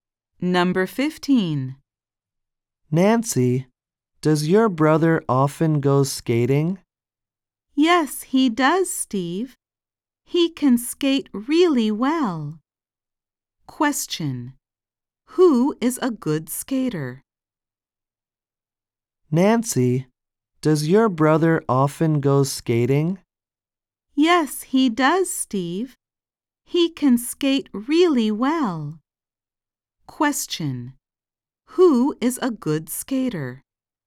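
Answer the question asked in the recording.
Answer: Nancy's brother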